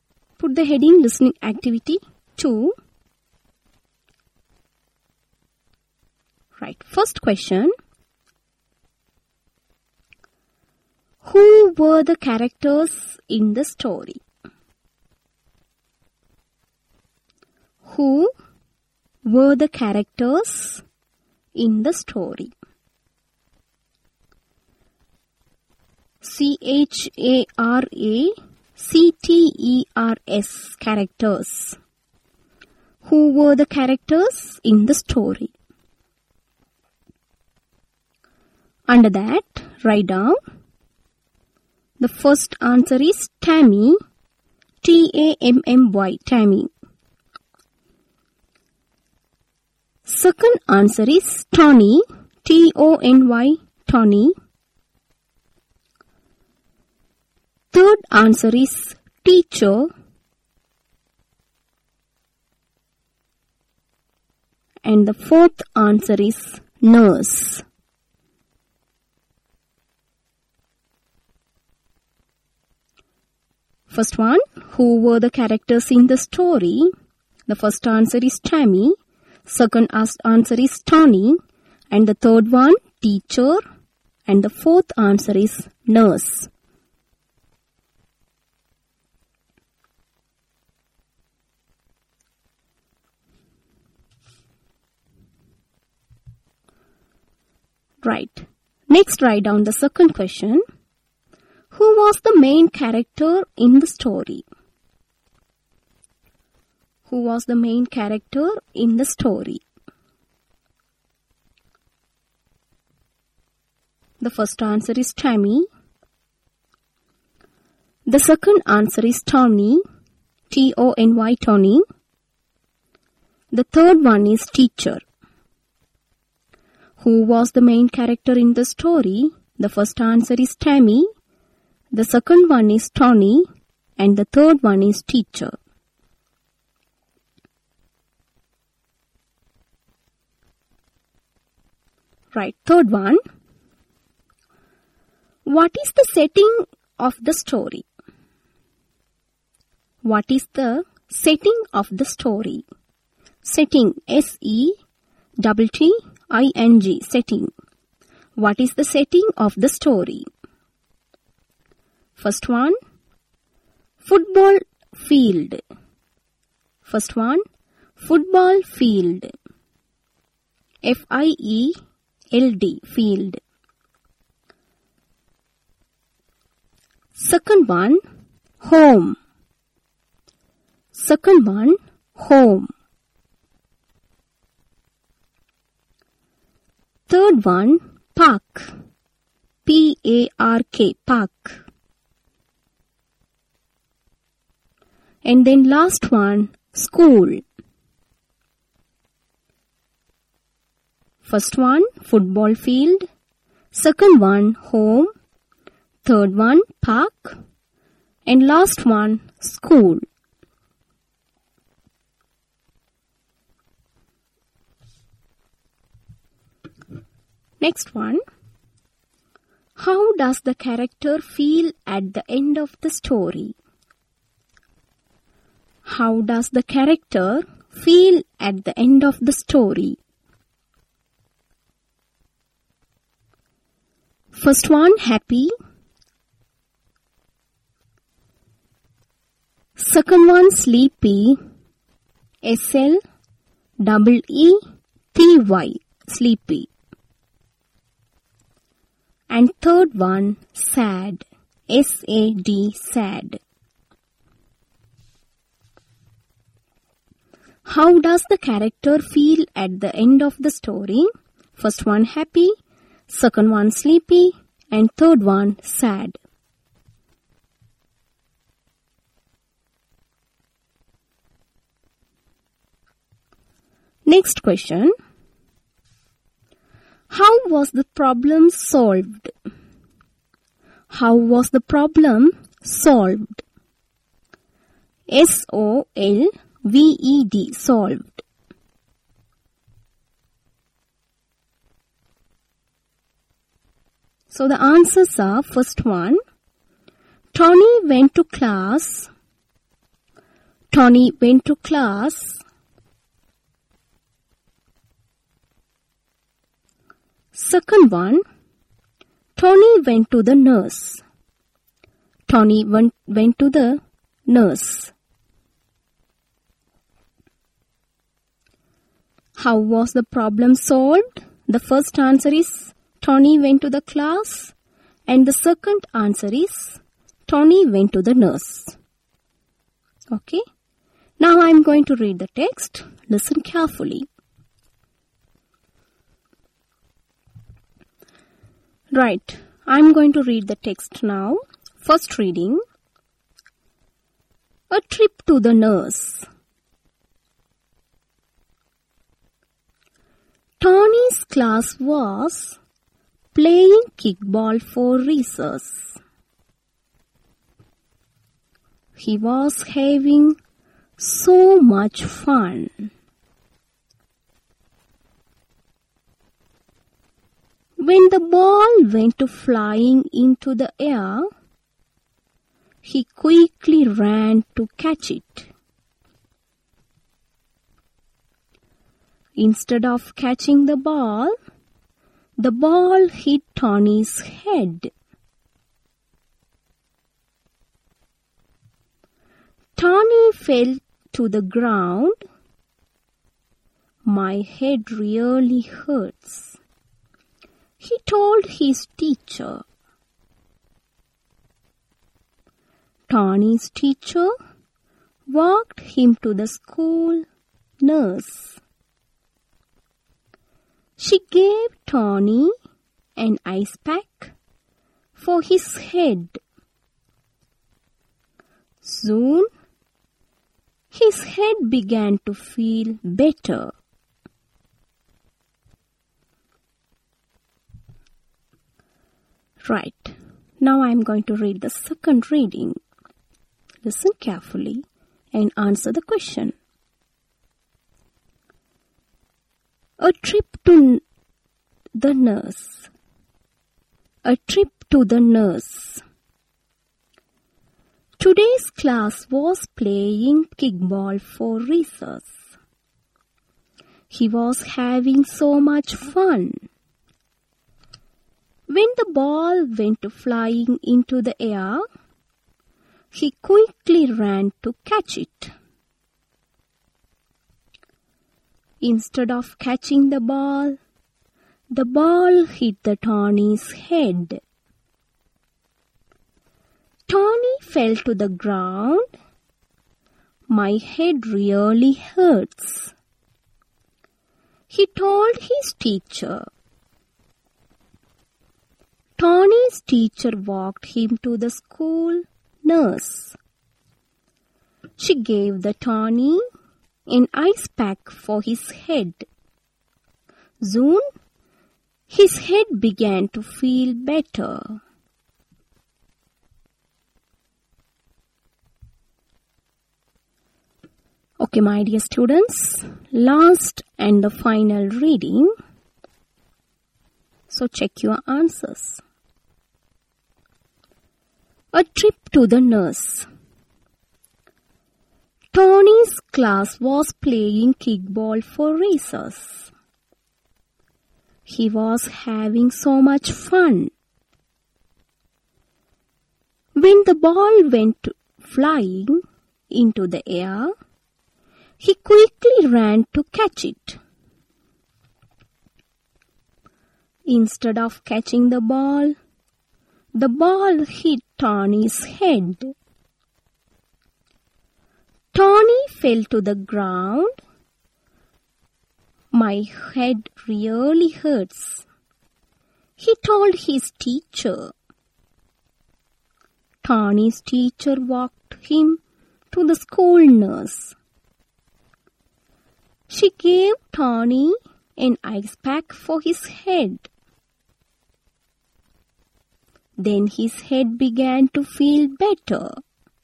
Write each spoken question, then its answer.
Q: Who were the characters in the story?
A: So the correct answer is Tony, teacher and the nurse.

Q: Who was the main character in the story?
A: Yes, Tony.

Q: What is the setting of the story?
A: So the correct answer is school.

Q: How does the character feel at the end of the story?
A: So the correct answer is happy, because his head began to feel better.

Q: How was the problem solved?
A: Tony went to the nurse.